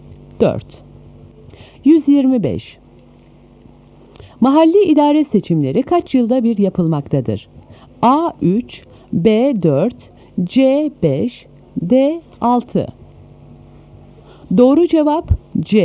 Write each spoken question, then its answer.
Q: Mahalli idare seçimleri kaç yılda bir yapılmaktadır?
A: Doğru cevap C.